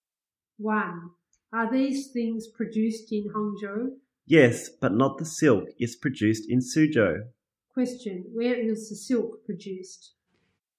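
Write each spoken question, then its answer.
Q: Question, where is the silk produced?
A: In Suzhou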